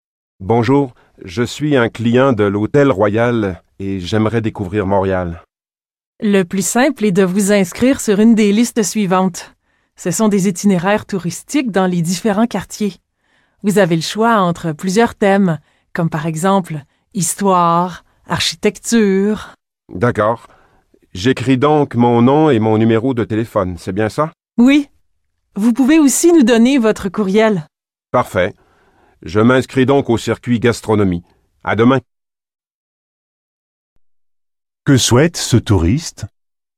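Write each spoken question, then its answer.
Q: Que souhaite ce touriste ?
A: Faire le circuit gastronomie de Montréal.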